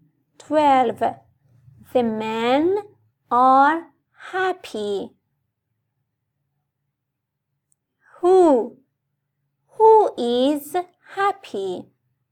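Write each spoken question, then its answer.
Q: Who is happy?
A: the men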